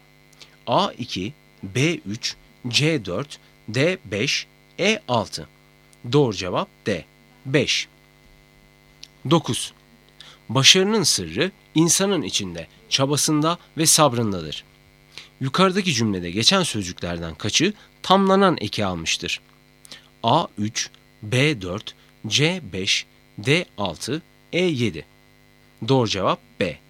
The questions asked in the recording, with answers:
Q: Yukarıdaki cümlede geçen sözcüklerden kaçı tamlanan eki almıştır?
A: Doğru cevap B.